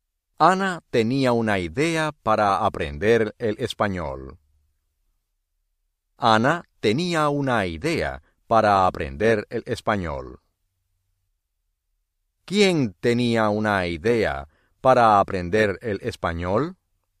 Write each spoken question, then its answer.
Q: ¿Quién tenía una idea para aprender el español?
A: Ana.